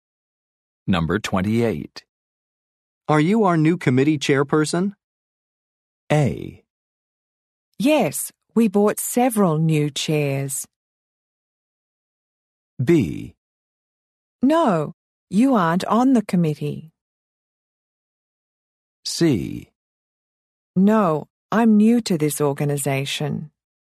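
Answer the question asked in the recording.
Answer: C: No, I'm new to this organization.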